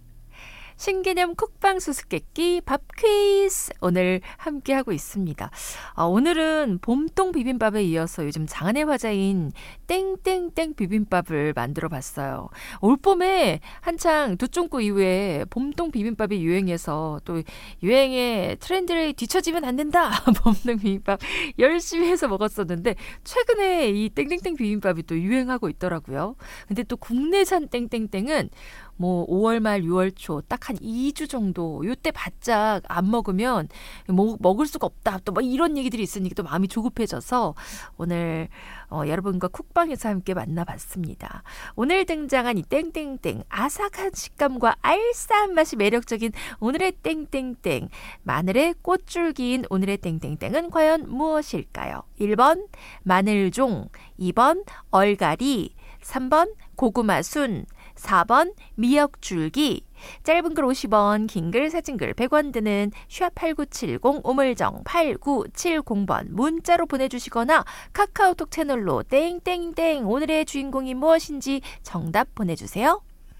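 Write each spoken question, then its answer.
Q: 오늘 등장한 이 땡땡땡 아삭한 식감과 알싸한 맛이 매력적인 오늘의 땡땡땡 마늘의 꽃줄기인 오늘의 땡땡땡은 과연 무엇일까요?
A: 1: 마늘종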